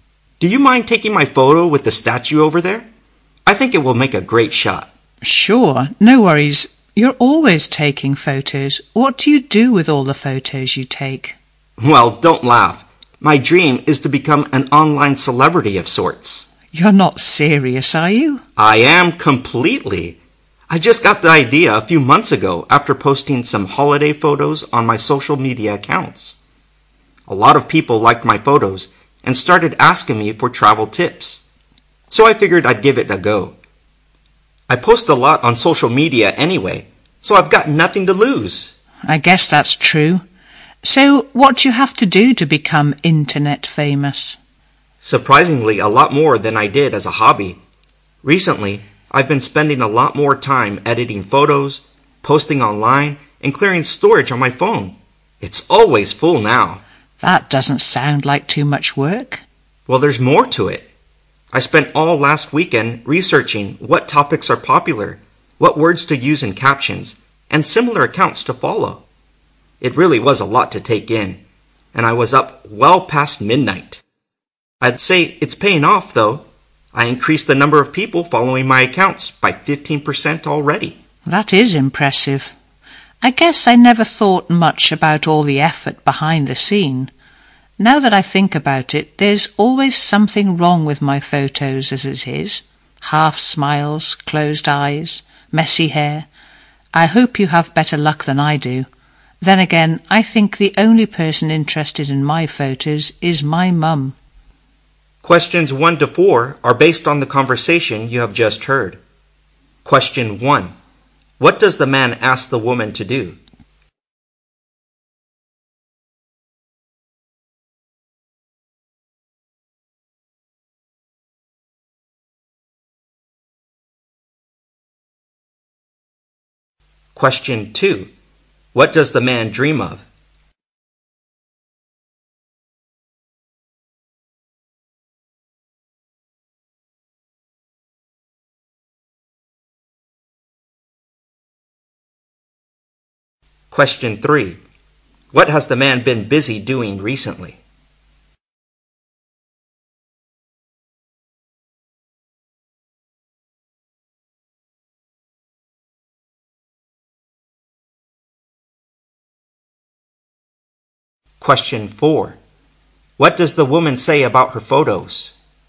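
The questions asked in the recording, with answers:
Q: What does the man ask the woman to do?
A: Take his photo with the statue

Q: What does the man dream of?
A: Becoming an online celebrity

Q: What has the man been busy doing recently?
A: Editing and posting photos online and researching popular topics

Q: What does the woman say about her photos?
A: There is always something wrong with them; only her mum is interested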